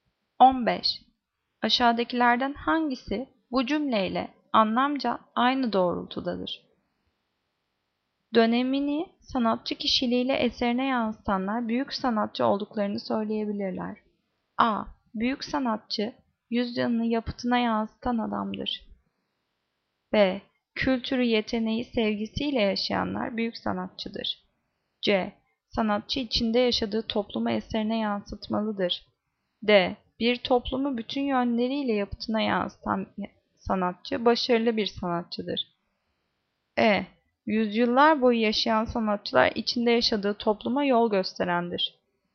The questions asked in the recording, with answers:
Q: Aşağıdakilerden hangisi bu cümleyle anlamca aynı doğrultudadır?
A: Cevap A. Büyük sanatçı yüzyılını yapıtına yansıtan adamdır.